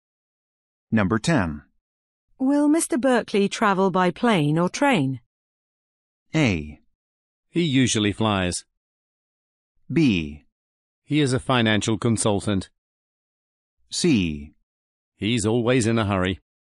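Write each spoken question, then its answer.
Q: Will Mr. Berkeley travel by plane or train?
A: A: He usually flies.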